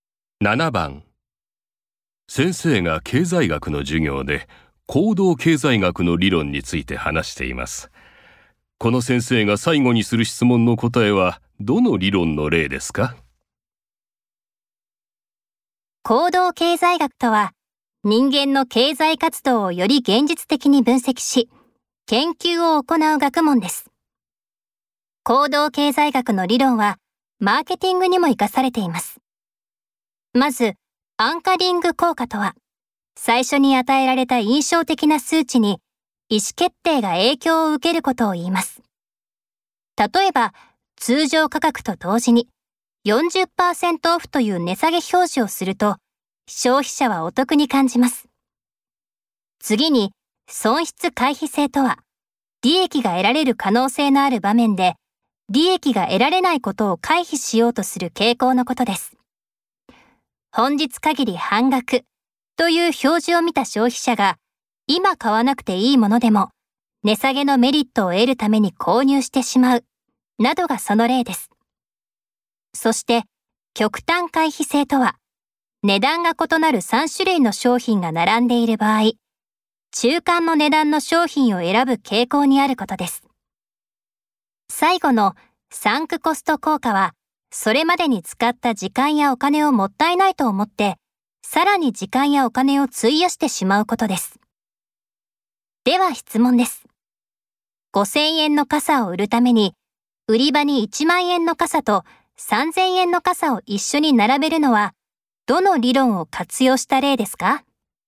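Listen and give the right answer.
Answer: 極端回避性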